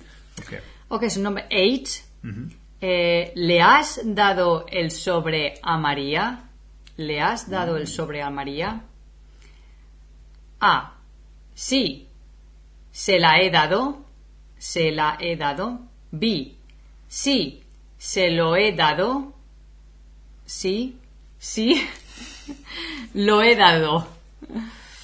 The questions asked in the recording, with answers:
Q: ¿Le has dado el sobre a María?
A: Okay, so I would say B, because we're talking about el sobre.